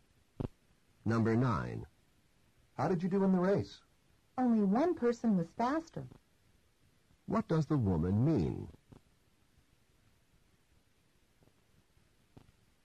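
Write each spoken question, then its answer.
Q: What does the woman mean?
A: She came in second.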